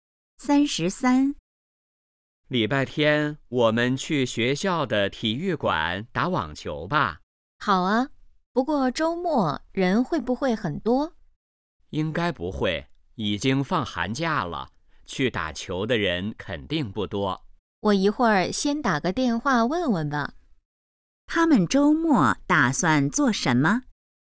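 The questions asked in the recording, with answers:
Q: 他们周末打算做什么?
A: 打网球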